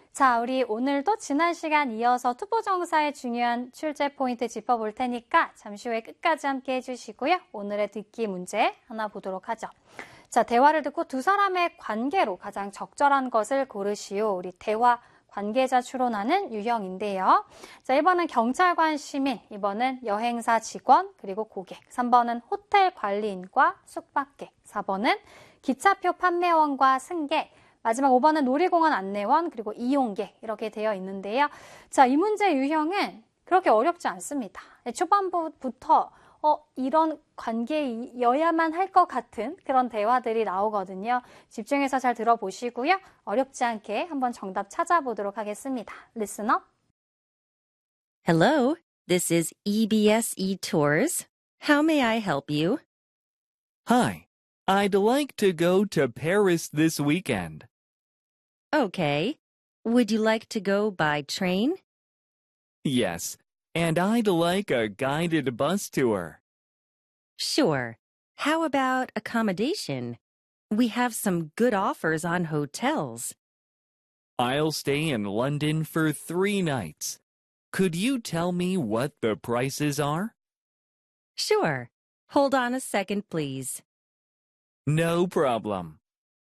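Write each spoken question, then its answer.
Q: 자, 대화를 듣고 두 사람의 관계로 가장 적절한 것을 고르시오.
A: 2: 여행사 직원, 그리고 고객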